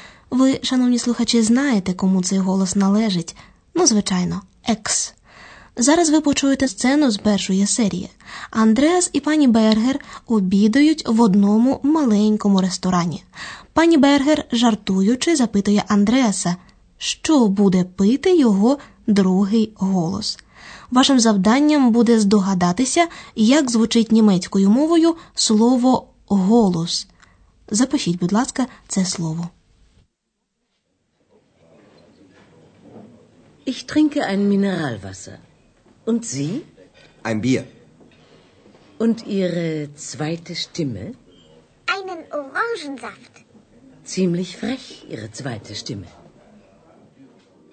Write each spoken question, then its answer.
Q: Вашим завданням буде здогадатися, як звучить німецькою мовою слово голос.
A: Правильна відповідь штімме.